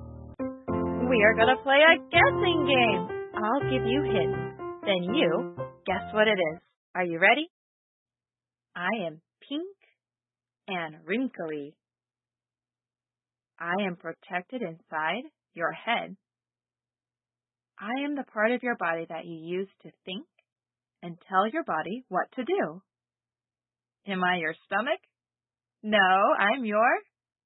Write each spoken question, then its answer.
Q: I am the part of your body that you use to think and tell your body what to do.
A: a brain.